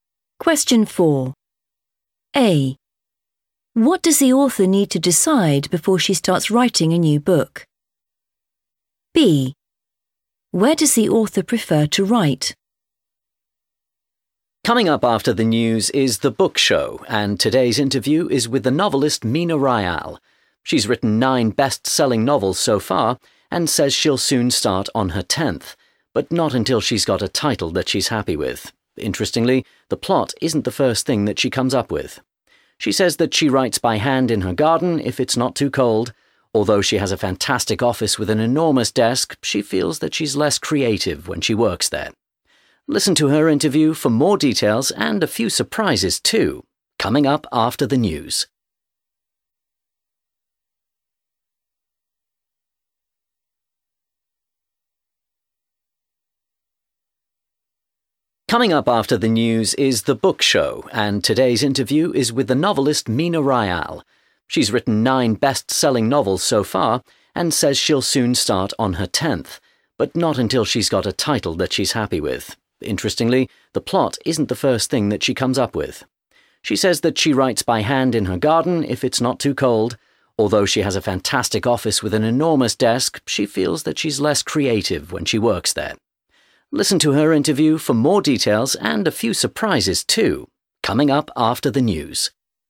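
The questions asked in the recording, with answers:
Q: What does the author need to decide before she starts writing a new book?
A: the title

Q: Where does the author prefer to write?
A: in her garden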